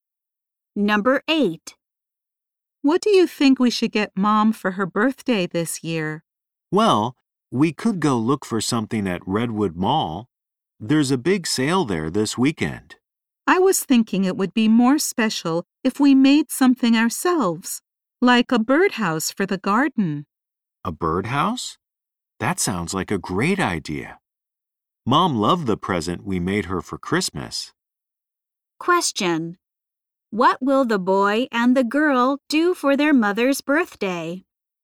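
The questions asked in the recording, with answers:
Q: What will the boy and the girl do for their mother's birthday?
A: Make her a birdhouse for the garden.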